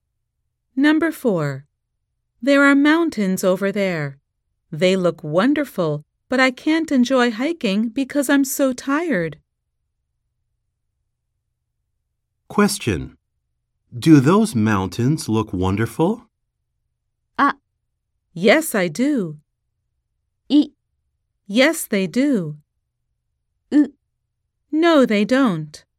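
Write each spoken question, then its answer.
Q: Do those mountains look wonderful?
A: イ: Yes, they do.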